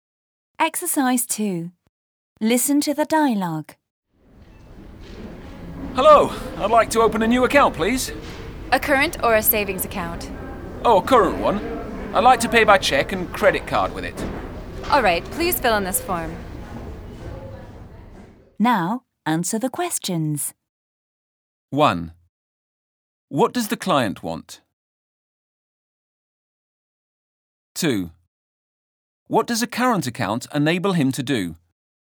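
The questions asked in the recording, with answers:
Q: What does the client want?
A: To open a new current account

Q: What does a current account enable him to do?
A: Pay by check and credit card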